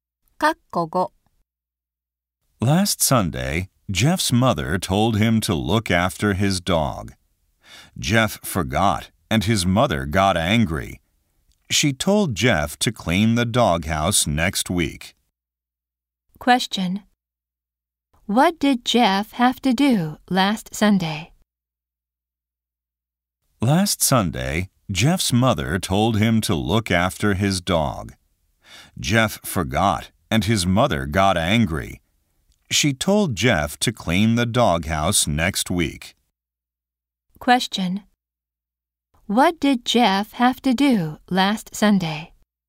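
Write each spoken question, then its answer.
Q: What did Jeff have to do last Sunday?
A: Look after his dog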